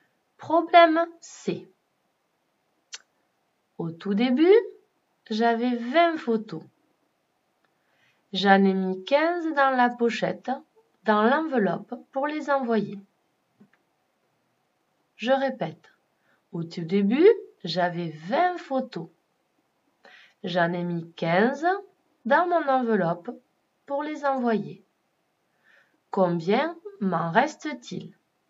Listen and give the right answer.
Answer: Il me reste 5 photos sur mon bureau.